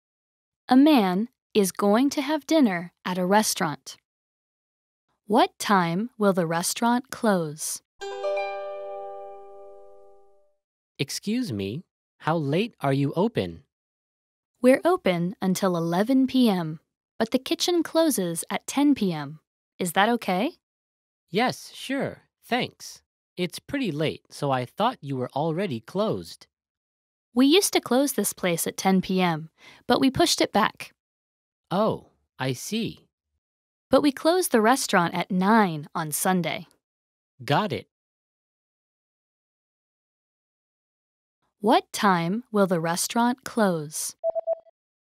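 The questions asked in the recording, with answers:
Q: What time will the restaurant close?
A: 11 p.m. (9 p.m. on Sunday)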